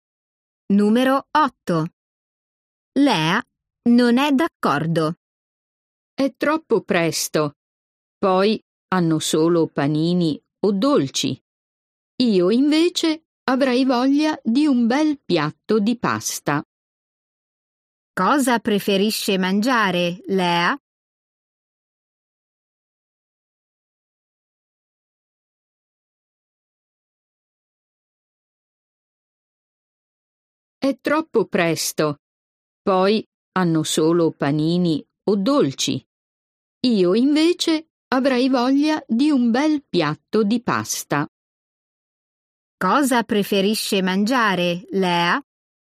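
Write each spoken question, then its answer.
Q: Cosa preferisce mangiare, Lea?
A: un piatto di pasta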